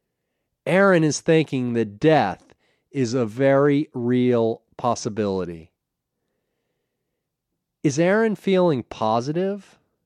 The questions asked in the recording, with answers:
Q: Is Aaron feeling positive?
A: No, he's not feeling positive.